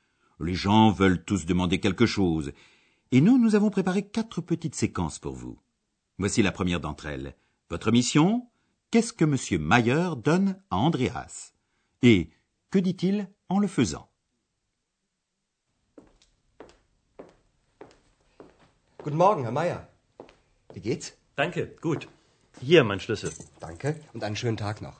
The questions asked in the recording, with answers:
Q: Votre mission, qu'est-ce que M. Mayer donne à Andreas? Et que dit-il en le faisant?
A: Monsieur Mayer pose sa clé sur la table et dit « Voici ma clé. »